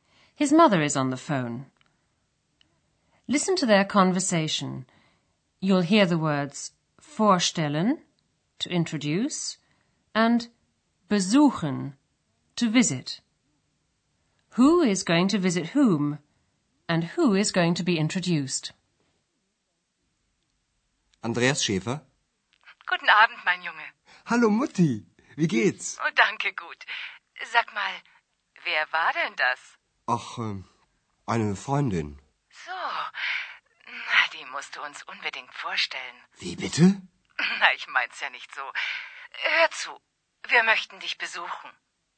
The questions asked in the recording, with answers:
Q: Who is going to visit whom?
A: Andreas's mother says she'd like to come and visit him in Aachen

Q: And who is going to be introduced?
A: and she'd also like to be introduced to X.